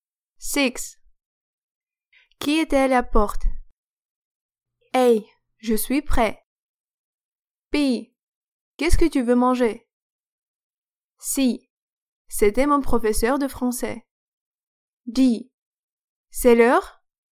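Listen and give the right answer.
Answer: C: C'était mon professeur de français.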